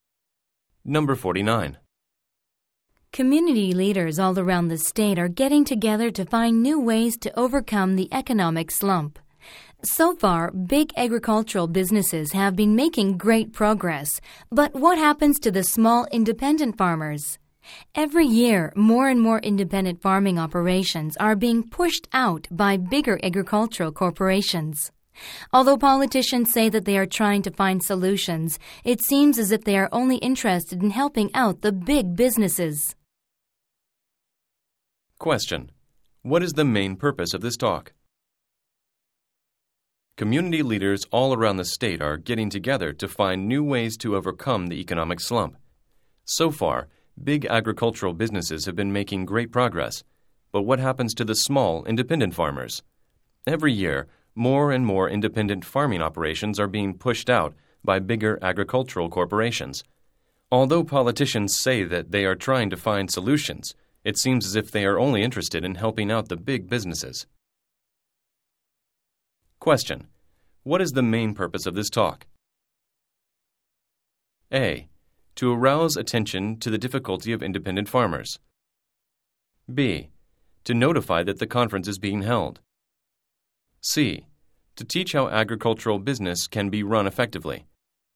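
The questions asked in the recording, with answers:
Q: What is the main purpose of this talk?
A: A: To arouse attention to the difficulty of independent farmers.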